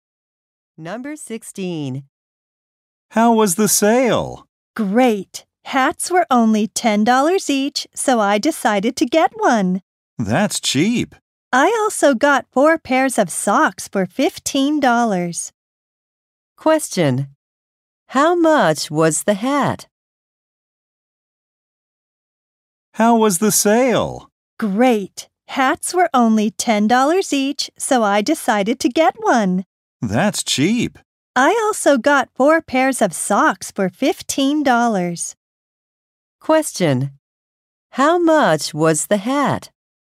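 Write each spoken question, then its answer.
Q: How much was the hat?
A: $10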